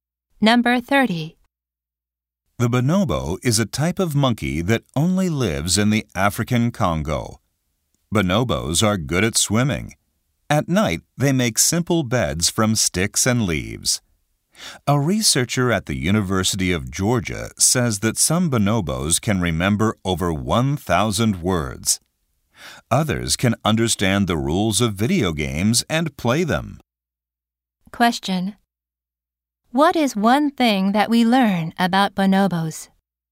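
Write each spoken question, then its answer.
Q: What is one thing that we learn about bonobos?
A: They are good at swimming.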